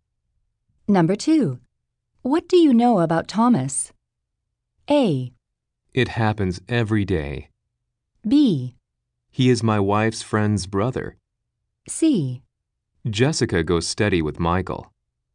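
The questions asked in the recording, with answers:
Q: What do you know about Thomas?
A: B: He is my wife's friend's brother.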